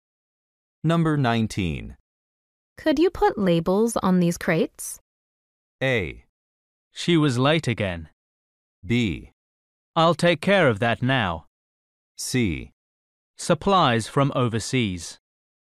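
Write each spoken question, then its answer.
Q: Could you put labels on these crates?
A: B: I'll take care of that now.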